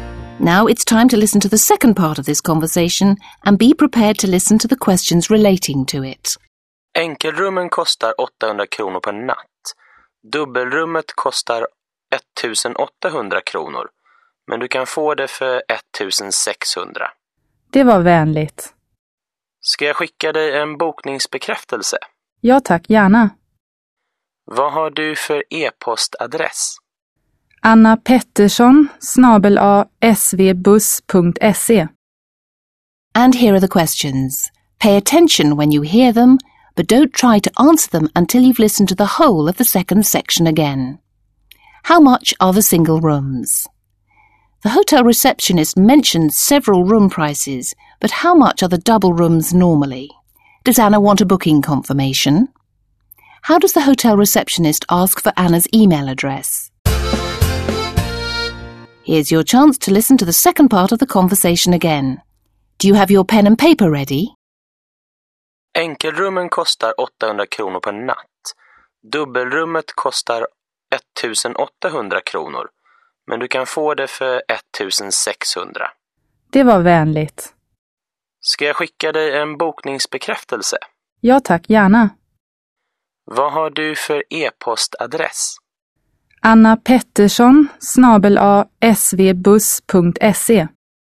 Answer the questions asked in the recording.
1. The single rooms are 800 kronor.
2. The cost of a double room is normally 1800 kronor.
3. Anna says that she'd be very pleased to receive a booking confirmation.
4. Vad har du för e-postadress?